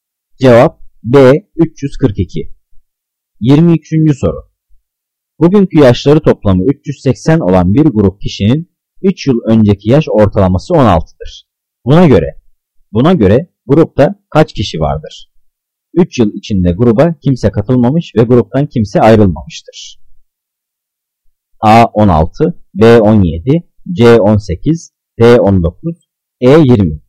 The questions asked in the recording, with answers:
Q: Buna göre grupta kaç kişi vardır?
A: Cevap E 20.